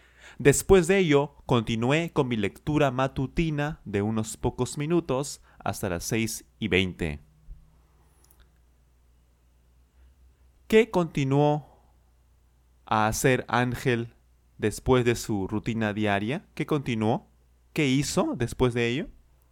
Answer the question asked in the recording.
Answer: Continuó con su rutina, con su lectura matutina, disculpen.